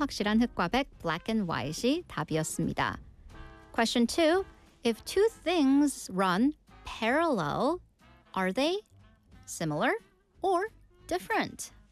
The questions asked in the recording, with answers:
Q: If two things run parallel, are they similar or different?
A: Of course, in English, when things are parallel, they are similar.